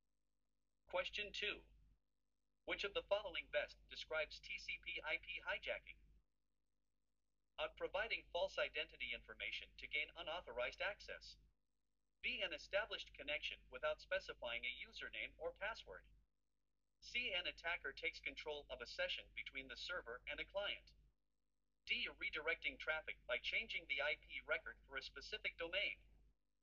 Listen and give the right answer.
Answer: The correct answer is C.